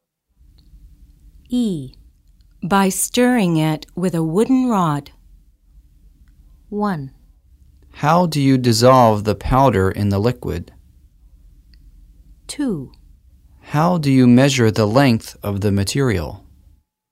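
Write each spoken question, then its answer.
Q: By stirring it with a wooden rod.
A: 1: How do you dissolve the powder in the liquid?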